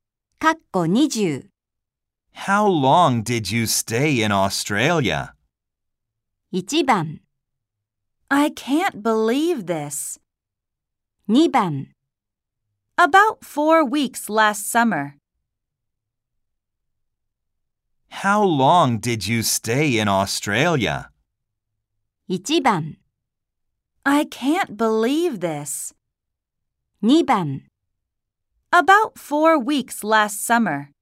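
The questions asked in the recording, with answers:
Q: How long did you stay in Australia?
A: 2: About 4 weeks last summer.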